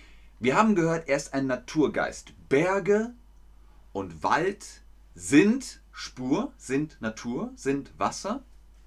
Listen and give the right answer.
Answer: Richtig. Berge und Wälder sind Natur.